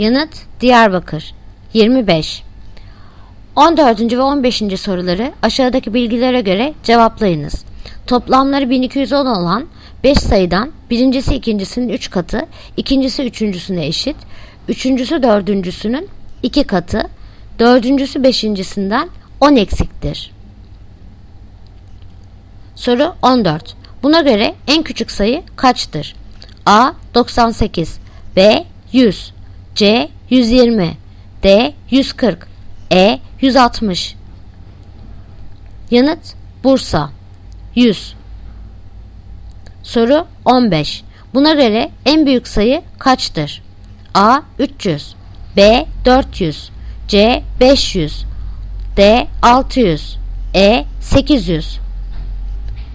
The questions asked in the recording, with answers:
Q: Buna göre en küçük sayı kaçtır?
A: Yanıt Bursa 100.